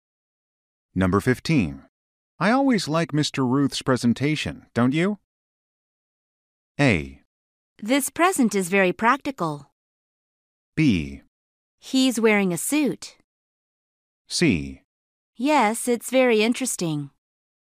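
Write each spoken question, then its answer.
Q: I always like Mr.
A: C: Yes, it's very interesting.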